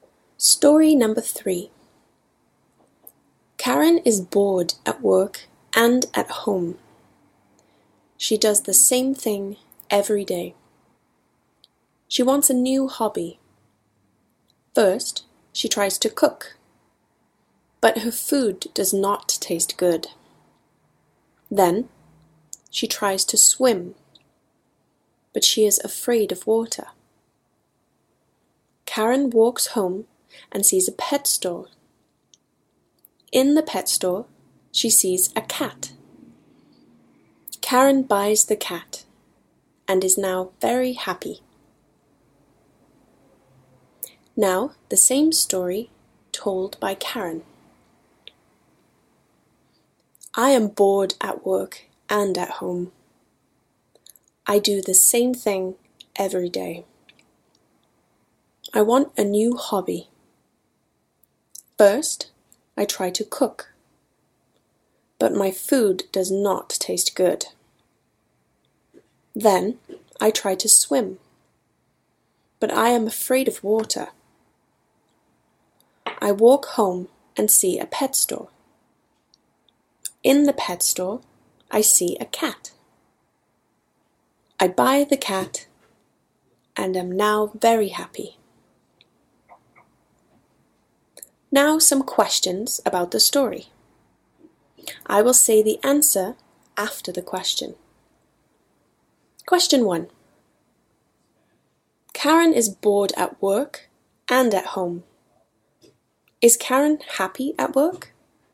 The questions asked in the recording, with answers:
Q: Is Karen happy at work?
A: No, Karen is not happy at work.